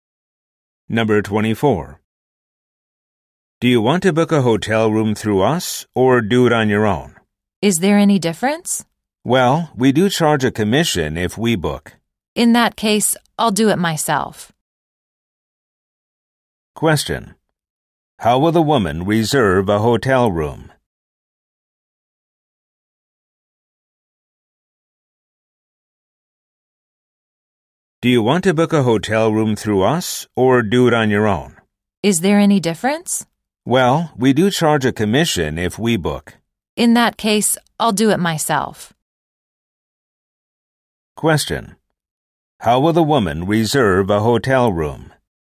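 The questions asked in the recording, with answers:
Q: How will the woman reserve a hotel room?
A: By herself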